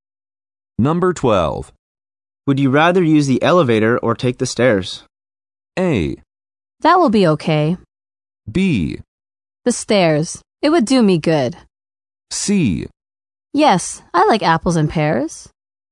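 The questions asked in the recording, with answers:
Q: Would you rather use the elevator or take the stairs?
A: B: The stairs. It would do me good.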